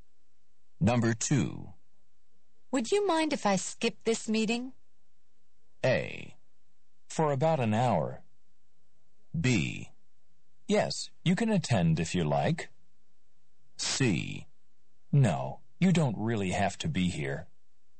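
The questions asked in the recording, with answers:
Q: Would you mind if I skip this meeting?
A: C: No, you don't really have to be here.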